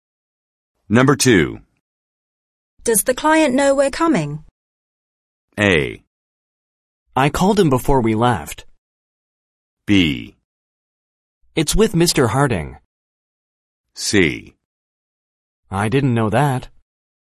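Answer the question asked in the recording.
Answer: A: I called him before we left.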